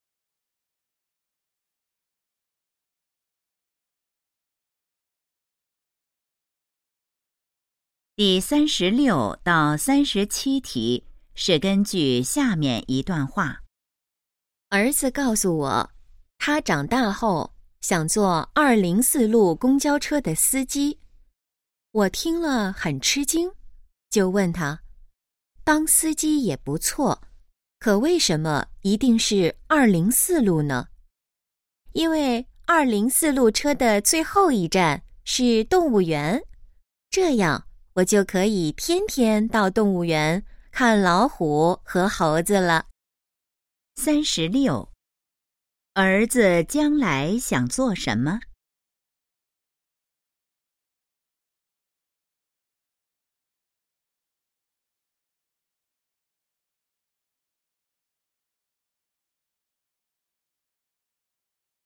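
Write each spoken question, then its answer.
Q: 儿子将来想做什么?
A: 204路公交车司机

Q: 关于204路公交车,可以知道什么?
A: 最后一站是动物园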